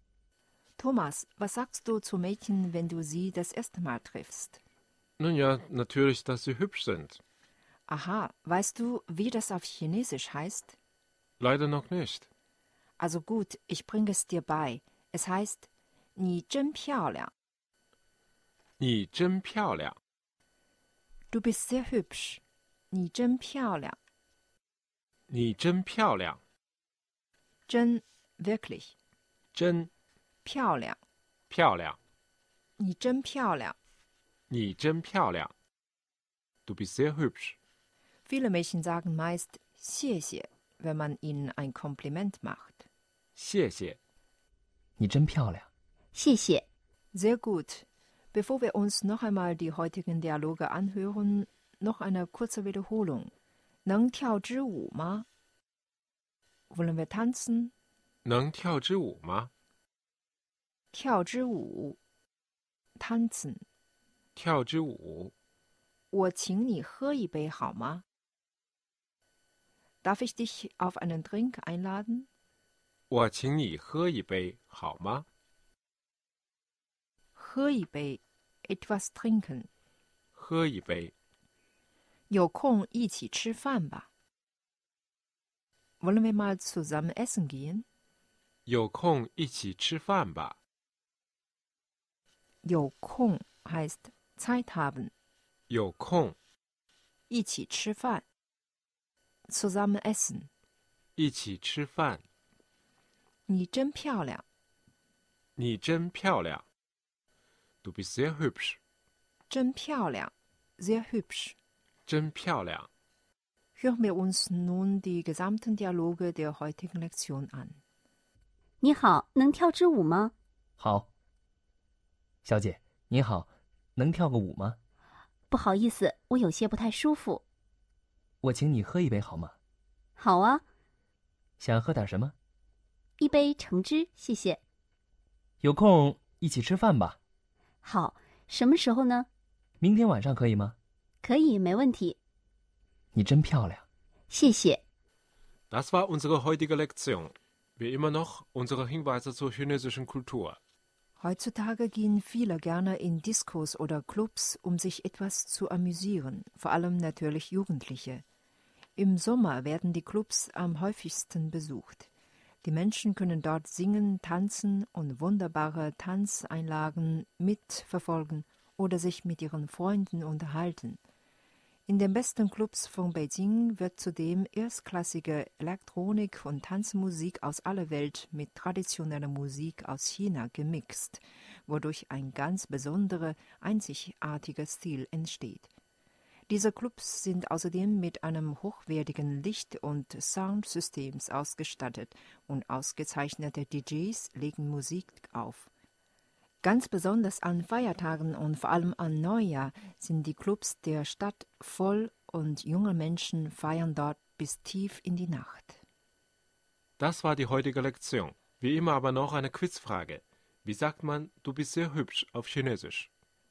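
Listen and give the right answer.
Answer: 你真漂亮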